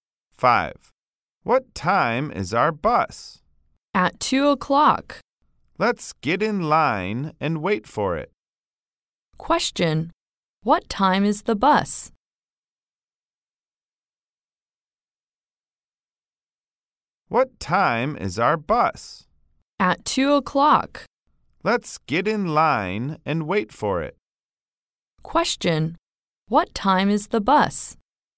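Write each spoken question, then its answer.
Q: What time is the bus?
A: 2 o'clock.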